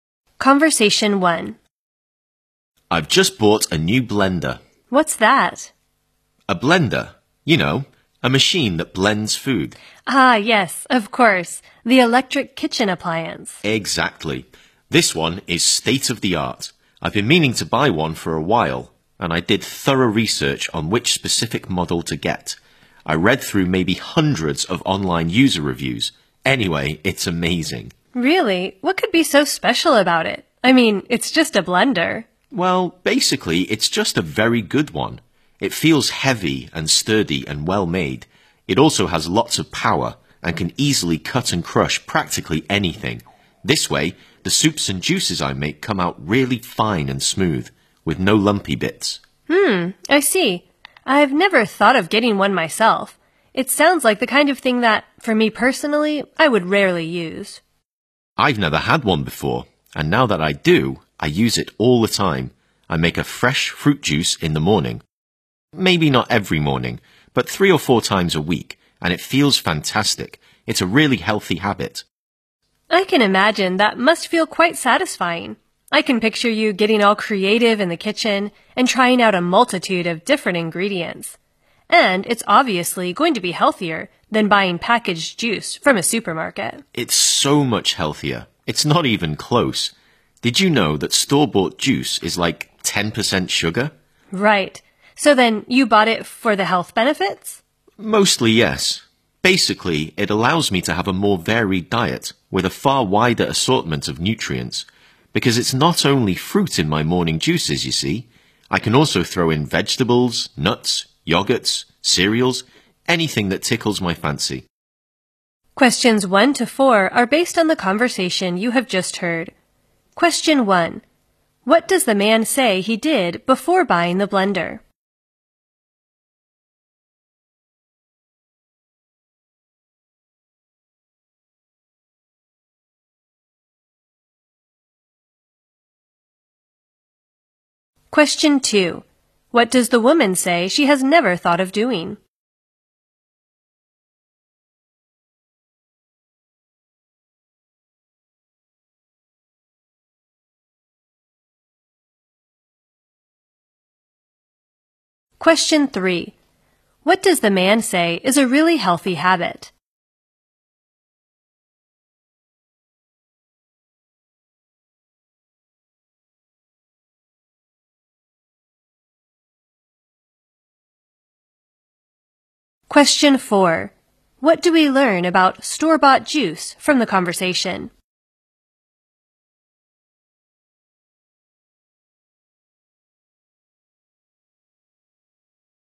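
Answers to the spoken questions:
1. He did thorough research, reading hundreds of online user reviews
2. Getting a blender herself
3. Making fresh fruit juice in the morning
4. It is about 10% sugar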